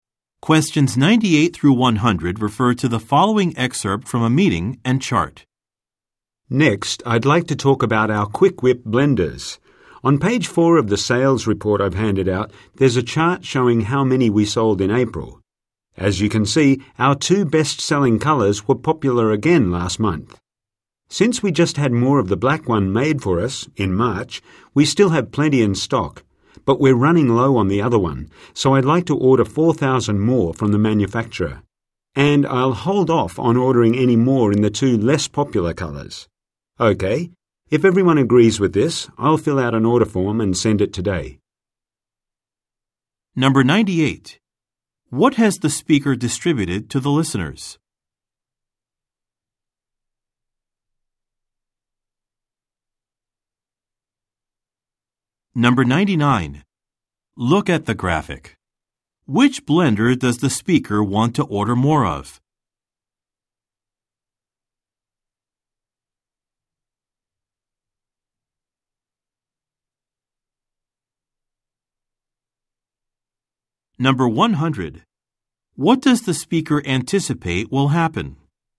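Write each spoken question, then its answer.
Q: What has the speaker distributed to the listeners?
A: A sales report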